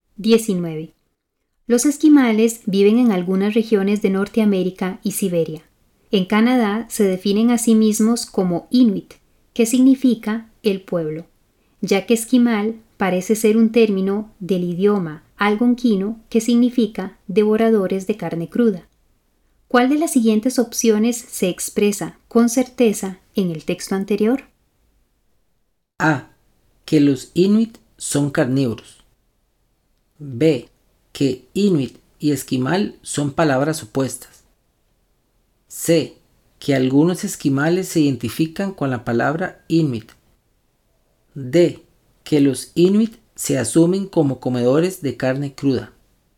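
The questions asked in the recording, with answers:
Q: ¿Cuál de las siguientes opciones se expresa con certeza en el texto anterior?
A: C: Que algunos esquimales se identifican con la palabra Inuit.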